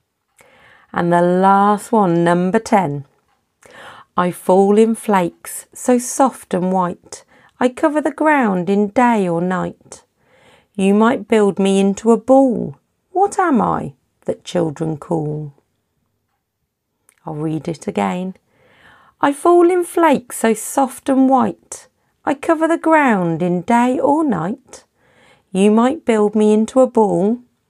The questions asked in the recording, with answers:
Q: What am I that children call?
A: The answer, of course, was snow